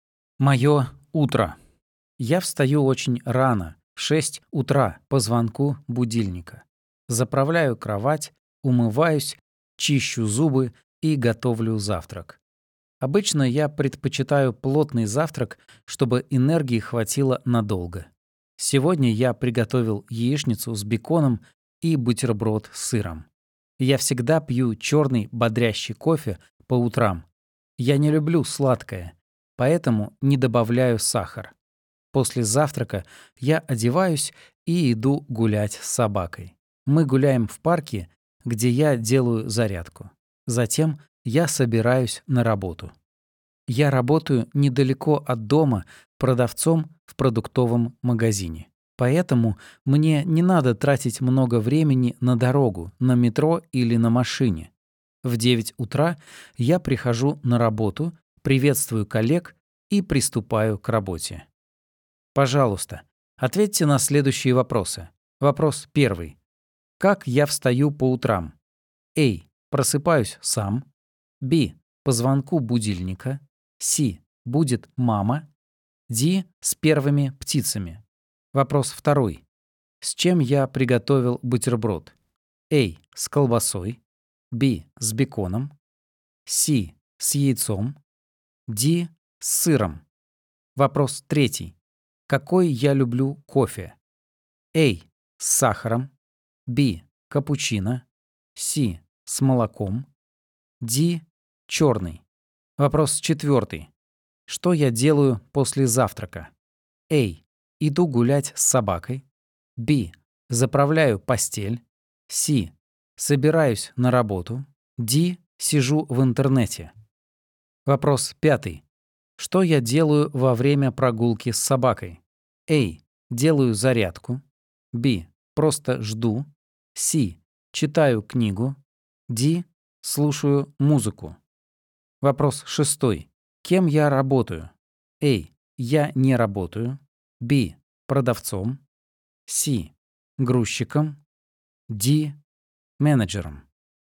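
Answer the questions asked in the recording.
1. B: По звонку будильника.
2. D: С сыром.
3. D: Черный.
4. A: Иду гулять с собакой.
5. A: Делаю зарядку.
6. B: Продавцом.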